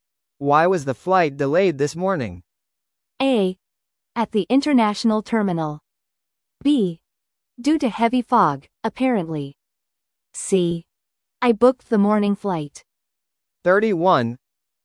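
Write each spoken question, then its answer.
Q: Why was the flight delayed this morning?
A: B: Due to heavy fog, apparently.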